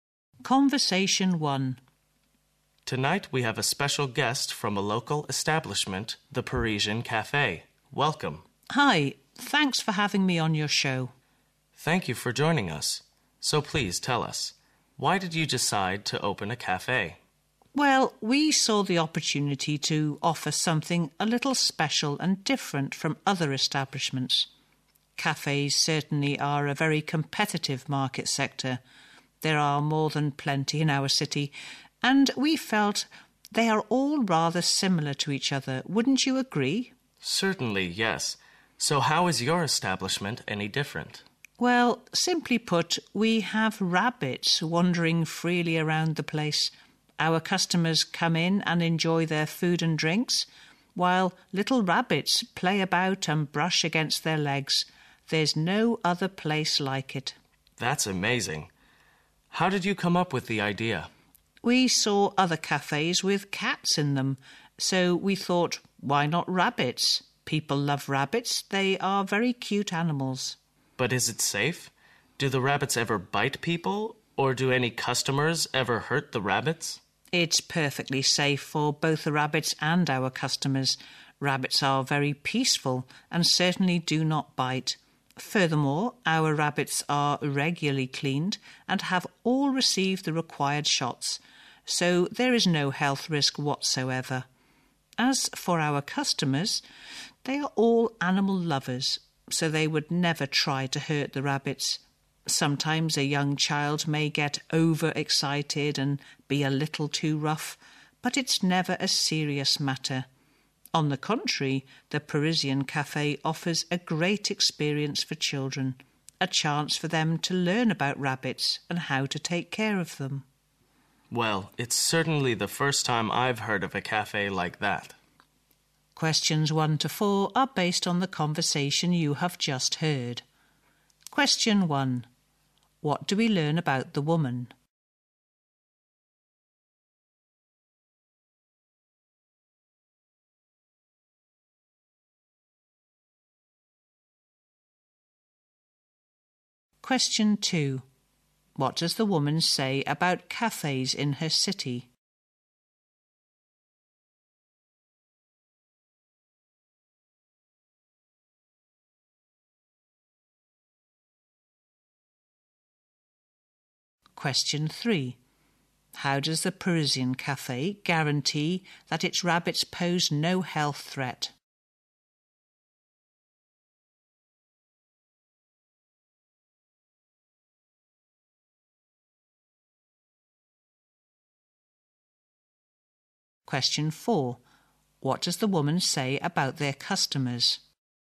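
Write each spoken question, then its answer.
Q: What does the woman say about cafes in her city?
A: There are plenty and they are all rather similar

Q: How does the Parisian Café guarantee that its rabbits pose no health threat?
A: The rabbits are regularly cleaned and have received the required shots

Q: What does the woman say about their customers?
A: They are all animal lovers who would never hurt the rabbits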